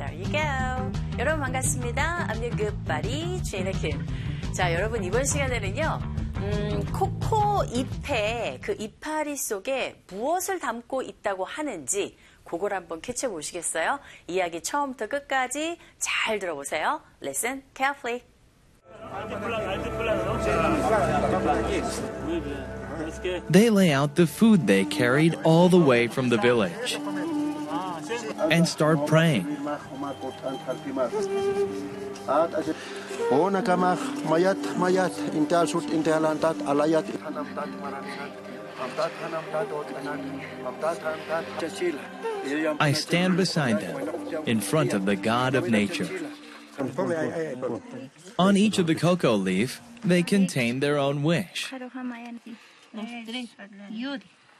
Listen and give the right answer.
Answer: 잎 하나하나에 사람들의 그 소망이 담겨있다